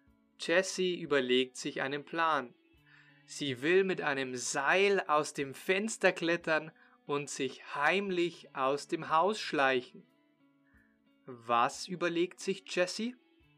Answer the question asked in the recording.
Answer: Einen Plan. Sie überlegt sich einen Plan.